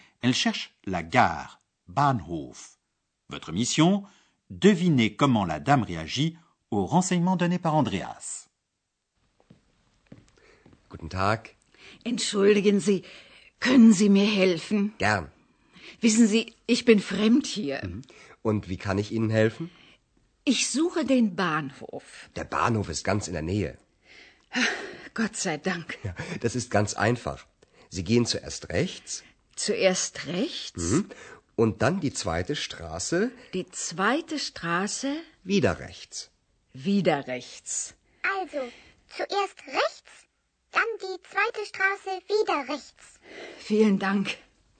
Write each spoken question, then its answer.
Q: Devinez comment la dame réagit aux renseignements donnés par Andreas.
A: la vieille dame réagit en s'exclamant Dieu soit loué.